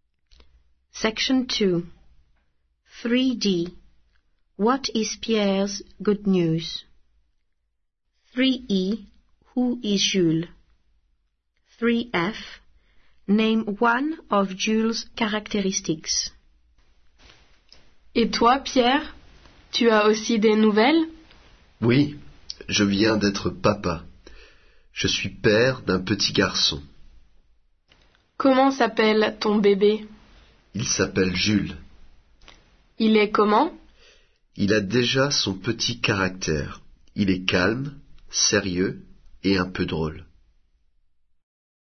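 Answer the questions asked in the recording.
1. He has just become a dad (of a baby boy)
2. His baby son
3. Calm, serious or a bit funny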